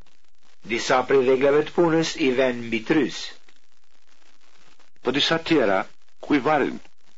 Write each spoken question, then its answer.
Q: Po disa tjera, ku i varin?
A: Disa tjera i varin në mur.